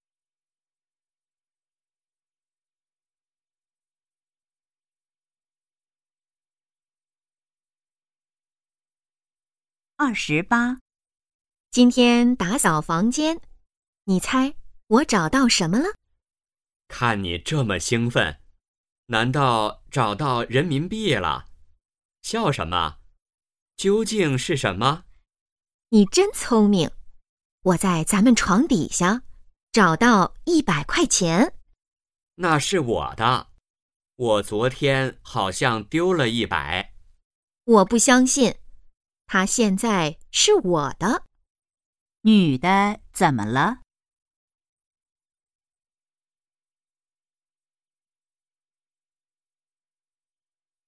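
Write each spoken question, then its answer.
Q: 女的怎么了?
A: 找到了100块钱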